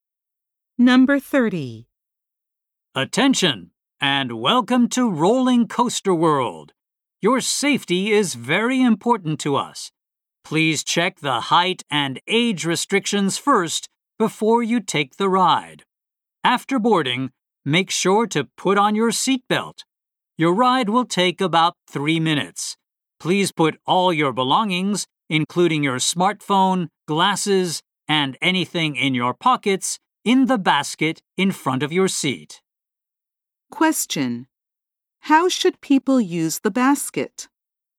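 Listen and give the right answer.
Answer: Put all their belongings in it.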